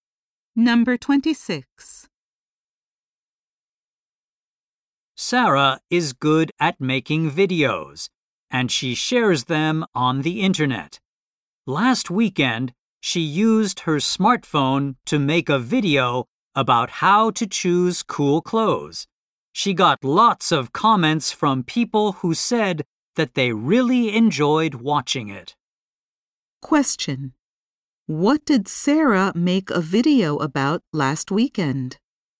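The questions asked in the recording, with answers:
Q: What did Sarah make a video about last weekend?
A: How to choose cool clothes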